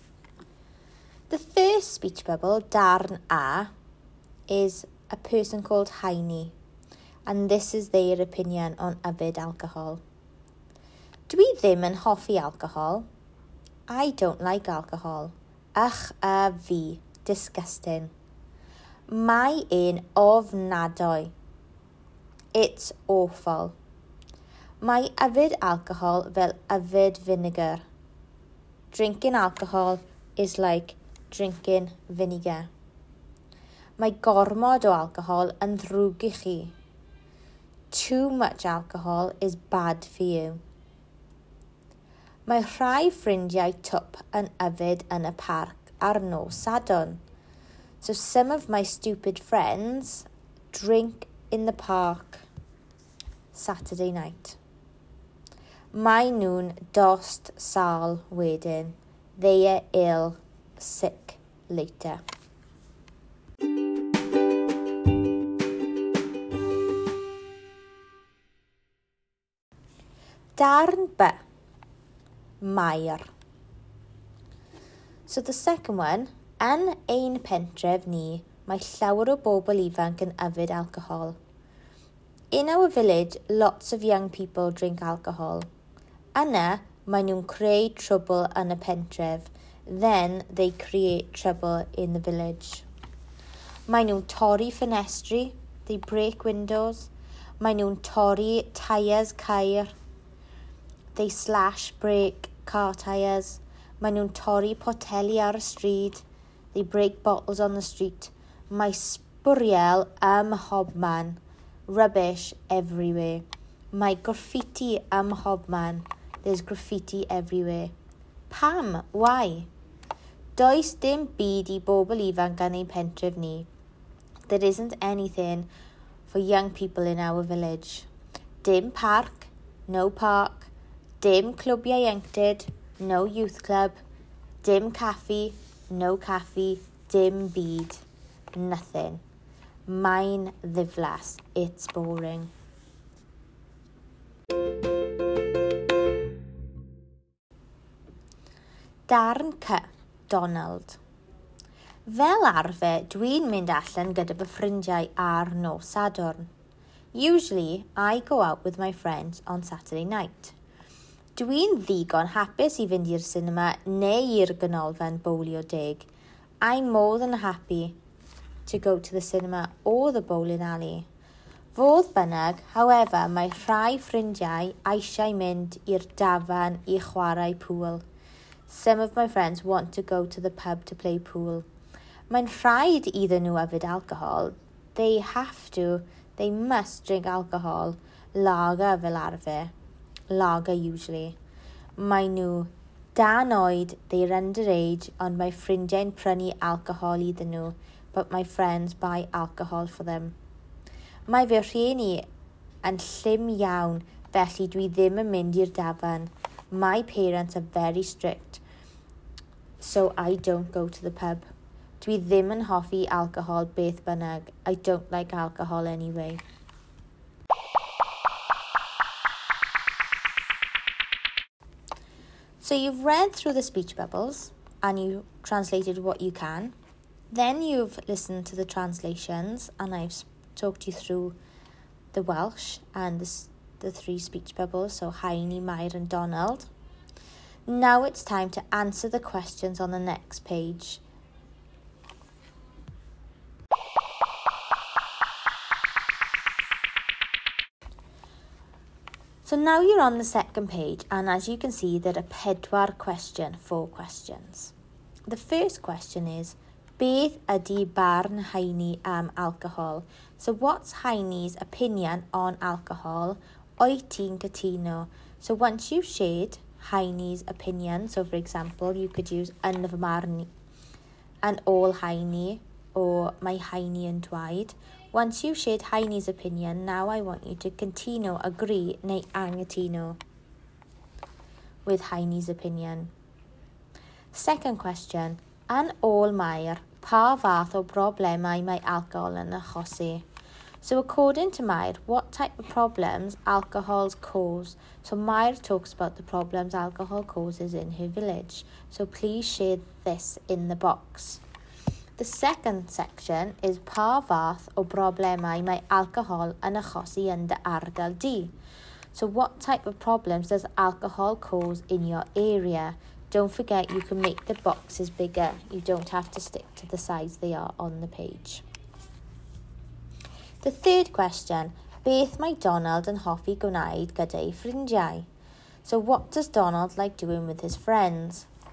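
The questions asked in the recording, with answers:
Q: beth ydy barn haini am alcohol?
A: Dydy hi ddim yn hoffi alcohol – mae'n ofnadwy, fel yfed finegr, ac mae gormod yn ddrwg i chi

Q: an ôl Mair, pa fath o broblemau mae alcohol yn achosi?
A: Pobl ifanc yn creu trwbl: torri ffenestri, teiars ceir a photeli, sbwriel a graffiti ym mhobman

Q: beth mae Donald yn hoffi gwneud gyda'i ffrindiau?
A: Mynd i'r sinema neu i'r ganolfan fowlio deg ar nos Sadwrn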